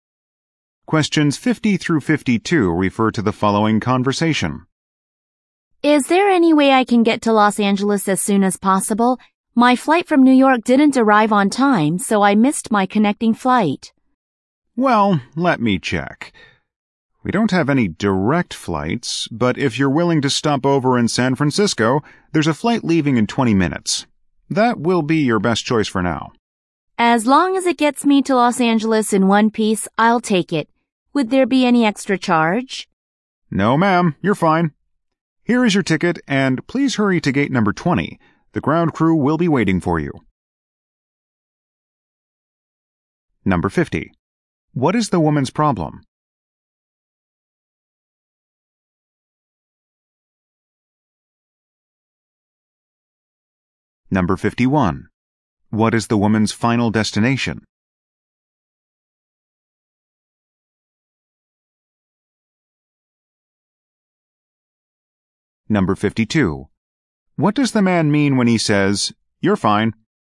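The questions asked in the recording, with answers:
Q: What is the woman's problem?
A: She missed her connecting flight

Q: What is the woman's final destination?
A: Los Angeles

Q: What does the man mean when he says, "You're fine"?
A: There is no extra charge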